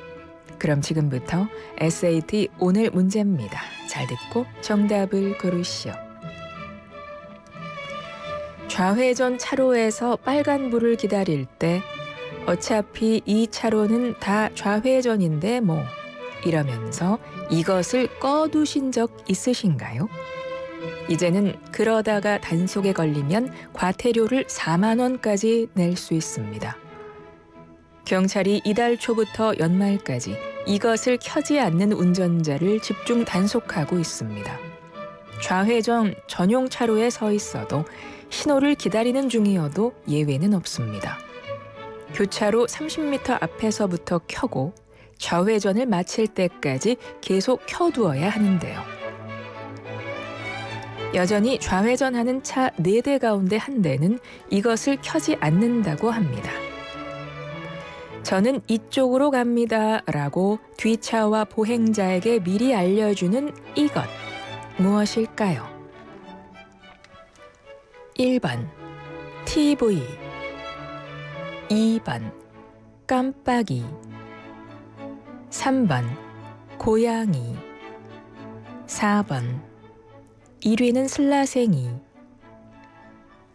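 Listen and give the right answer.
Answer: 2번: 깜빡이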